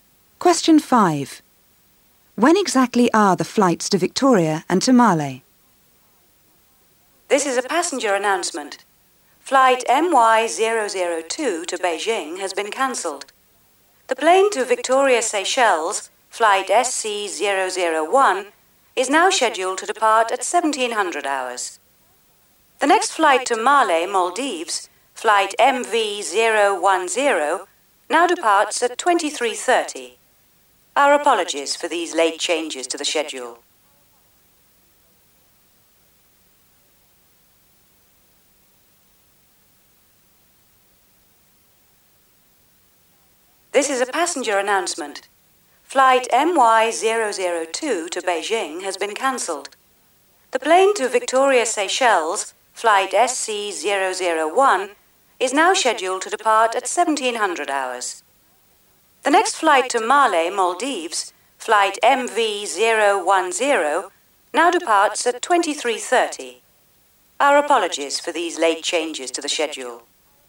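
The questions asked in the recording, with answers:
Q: When exactly are the flights to Victoria and to Male?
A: Victoria at 1700 hours; Male at 2330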